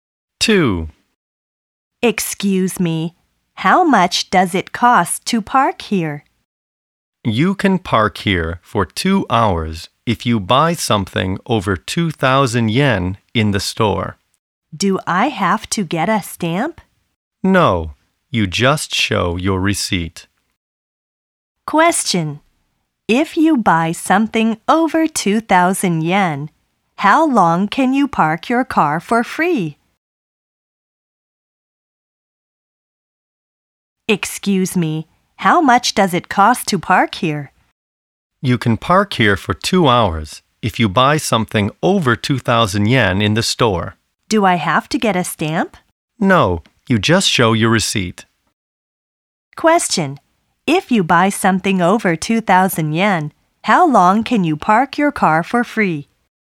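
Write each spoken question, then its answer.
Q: If you buy something over 2,000 yen, how long can you park your car for free?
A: For 2 hours.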